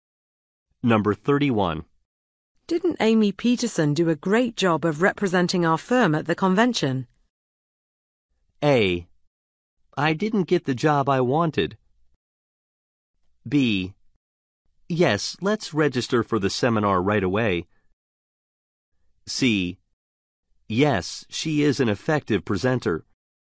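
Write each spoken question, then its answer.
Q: Didn't Amy Peterson do a great job of representing our firm at the convention?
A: C: Yes, she is an effective presenter.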